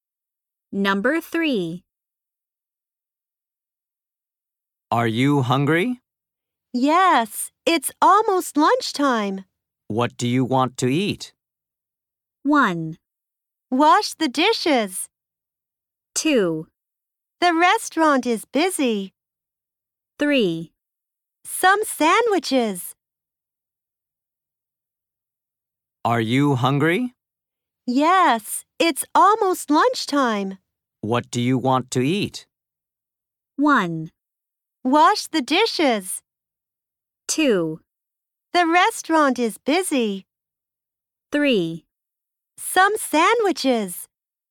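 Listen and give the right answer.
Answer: 3: Some sandwiches.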